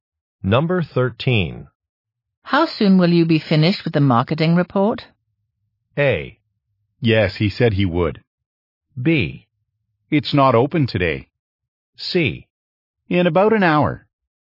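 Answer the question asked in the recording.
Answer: C: In about an hour.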